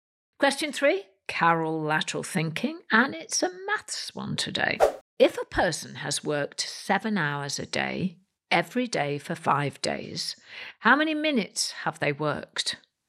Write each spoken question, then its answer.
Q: If a person has worked seven hours a day, every day for five days, how many minutes have they worked?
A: And the answer is 2,100 minutes.